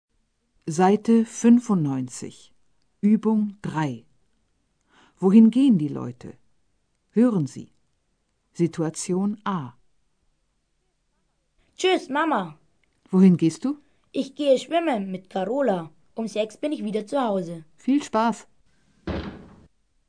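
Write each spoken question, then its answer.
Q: Wohin gehen die Leute?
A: Schwimmen (ins Schwimmbad)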